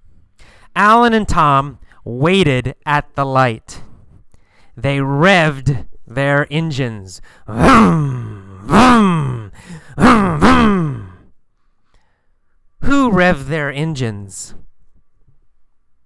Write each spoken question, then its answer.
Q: Who revved their engines?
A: Alan and Tom. Alan and Tom revved their engines.